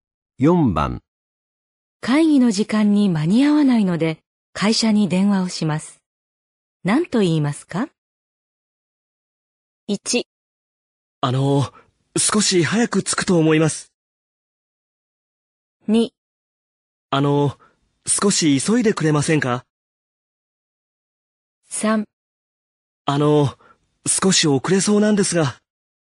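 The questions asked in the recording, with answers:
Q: 会議の時間に間に合わないので会社に電話をします。何と言いますか?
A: 3: 少し遅れそうなんですが。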